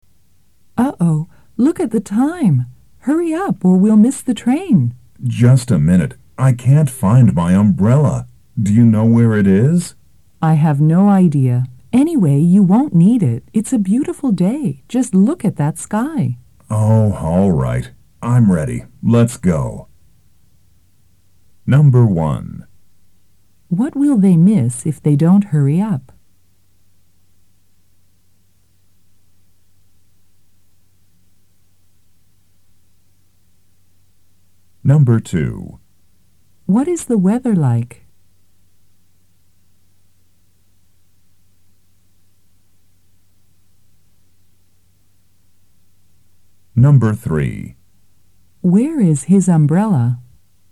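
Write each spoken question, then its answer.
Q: What will they miss if they don't hurry up?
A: The train

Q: What is the weather like?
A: It's a beautiful day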